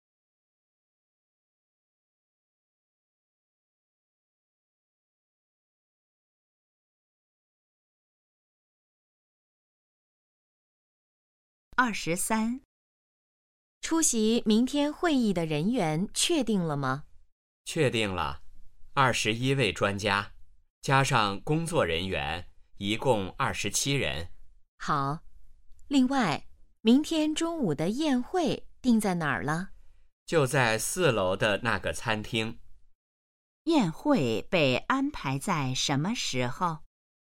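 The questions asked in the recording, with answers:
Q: 宴会被安排在什么时候?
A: 明天中午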